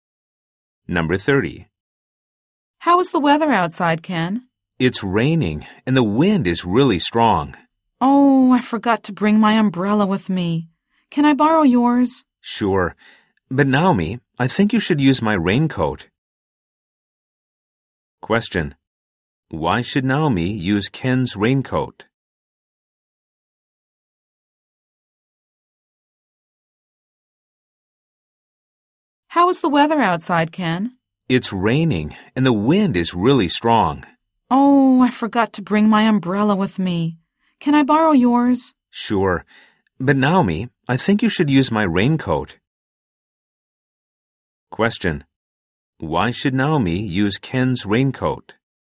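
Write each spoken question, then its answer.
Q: Why should Naomi use Ken's raincoat?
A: Because the wind is really strong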